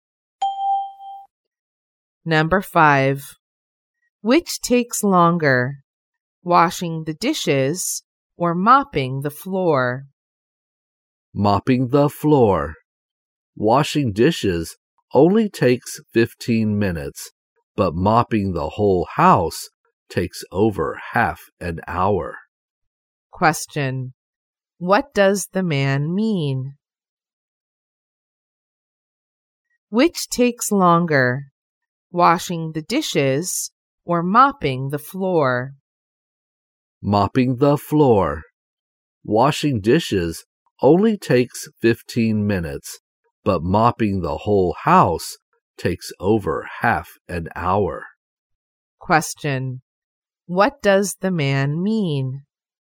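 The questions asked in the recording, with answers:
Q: What does the man mean?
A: Mopping the floor takes longer than washing the dishes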